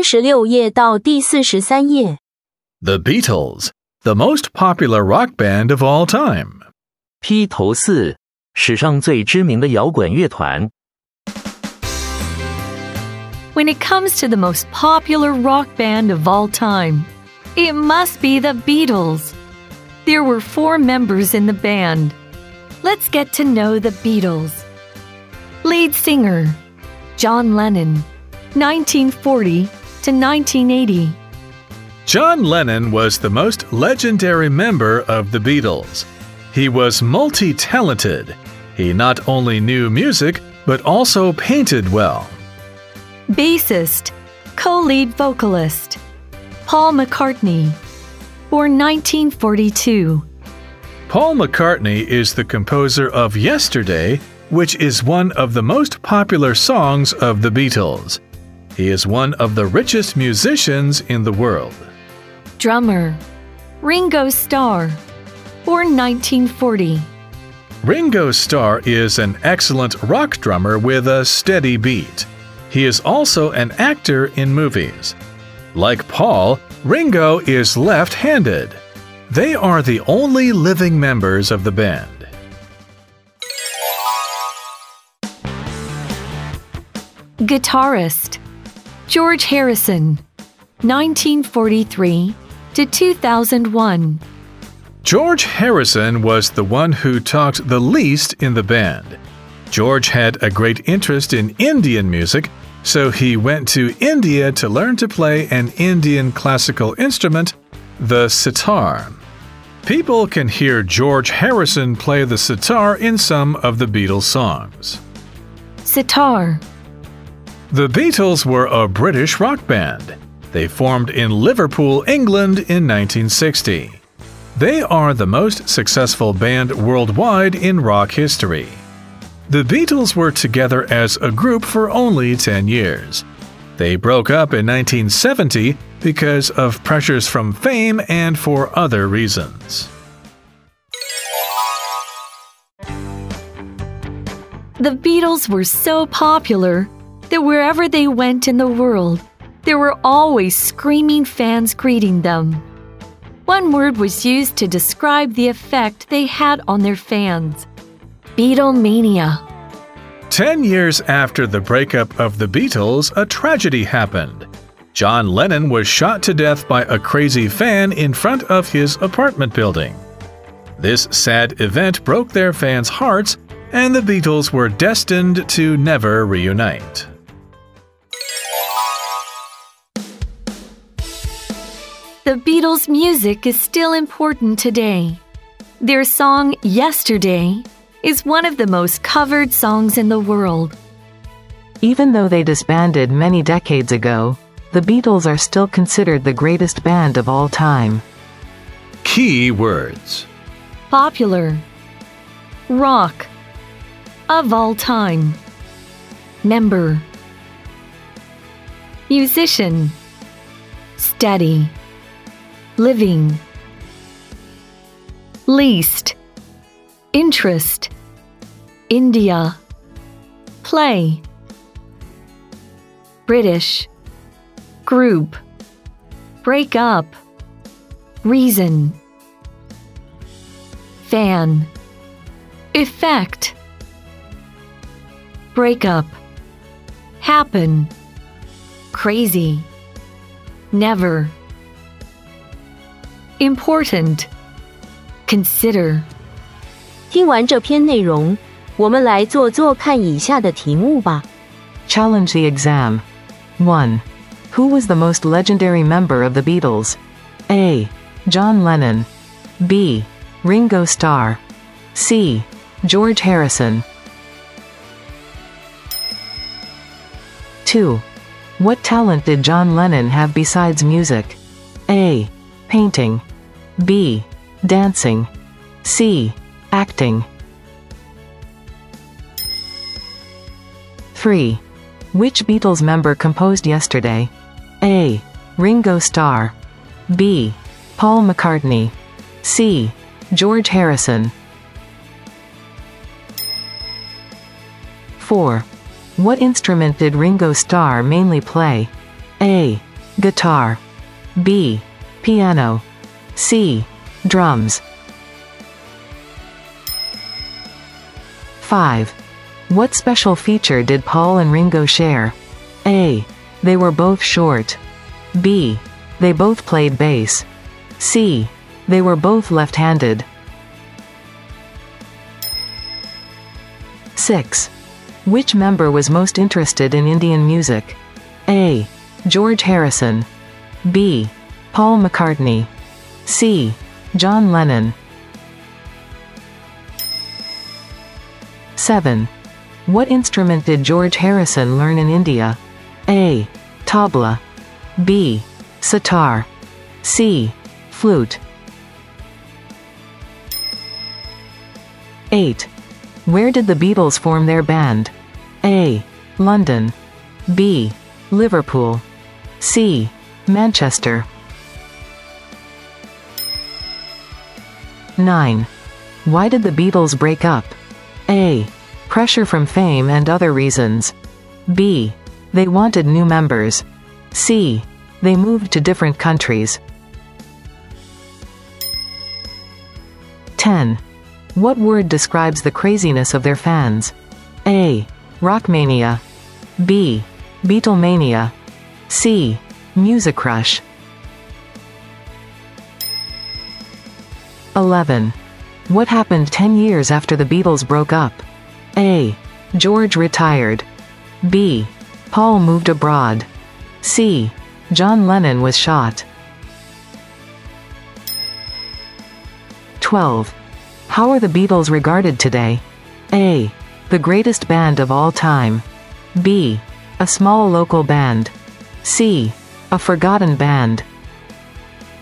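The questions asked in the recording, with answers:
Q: What talent did John Lennon have besides music?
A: A: Painting

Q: What instrument did Ringo Starr mainly play?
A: C: Drums

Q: What special feature did Paul and Ringo share?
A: C: They were both left-handed

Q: Which member was most interested in Indian music?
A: A: George Harrison

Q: What instrument did George Harrison learn in India?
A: B: Sitar

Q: What word describes the craziness of their fans?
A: B: Beatlemania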